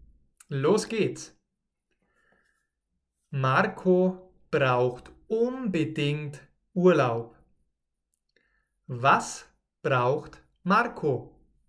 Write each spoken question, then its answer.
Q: Was braucht Marco?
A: Urlaub. Er braucht Urlaub.